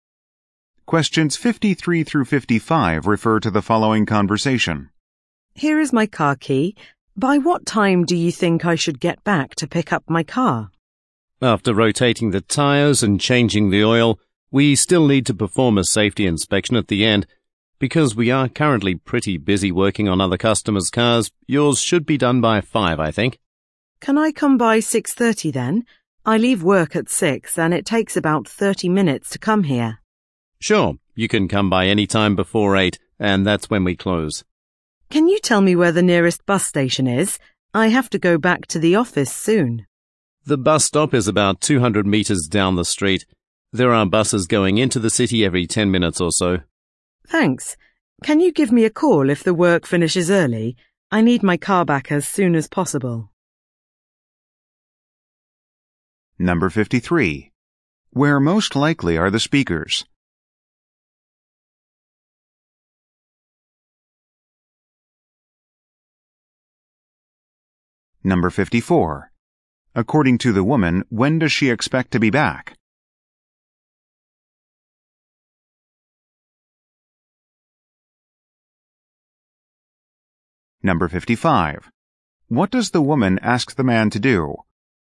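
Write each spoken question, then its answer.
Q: Where most likely are the speakers?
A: At a car repair shop

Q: According to the woman, when does she expect to be back?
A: At 6:30

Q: What does the woman ask the man to do?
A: Call her if the work finishes early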